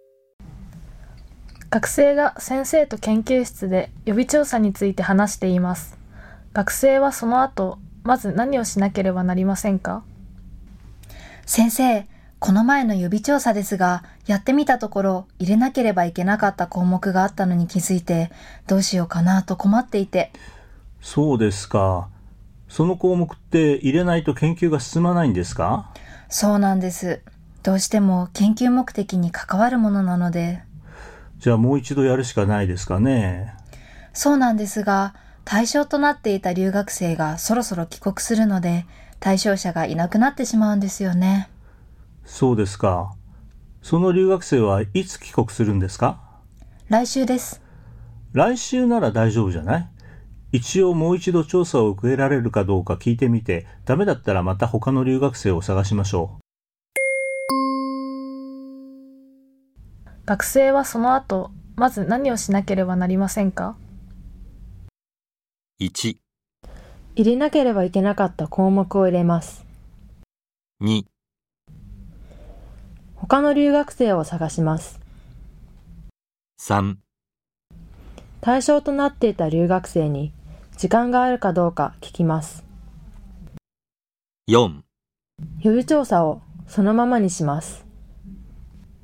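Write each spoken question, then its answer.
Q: 学生はその後まず何をしなければなりませんか?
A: 3: 対象となっていた留学生に時間があるかどうか聞きます。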